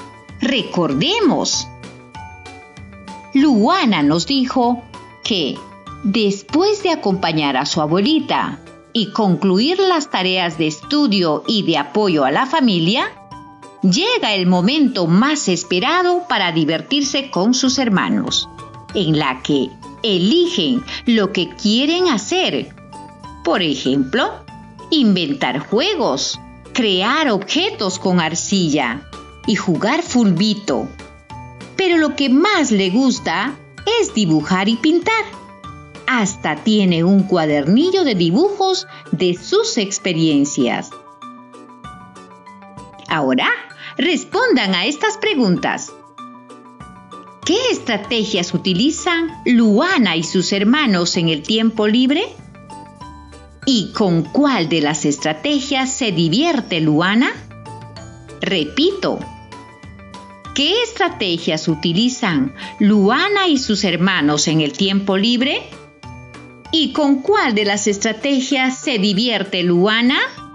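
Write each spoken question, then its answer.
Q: ¿Qué estrategias utilizan Luana y sus hermanos en el tiempo libre?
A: Inventar juegos, crear objetos con arcilla y jugar fulbito, dibujar y pintar

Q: ¿Y con cuál de las estrategias se divierte Luana?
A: Dibujar y pintar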